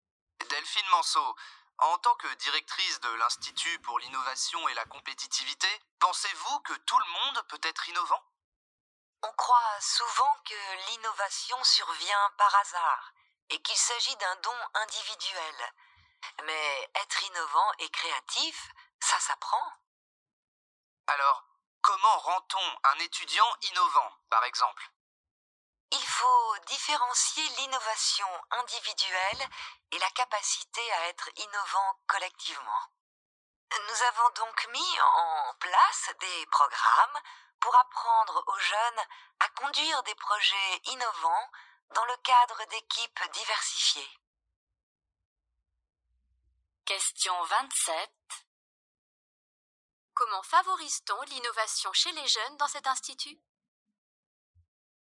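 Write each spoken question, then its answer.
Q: Comment favorise-t-on l'innovation chez les jeunes dans cet institut ?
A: Avec des programmes qui leur apprennent à conduire des projets innovants au sein d'équipes diversifiées.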